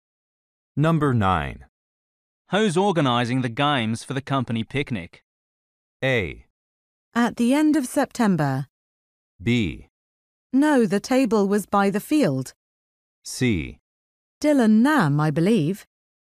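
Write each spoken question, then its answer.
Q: Who's organizing the games for the company picnic?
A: C: Dylan Nam, I believe.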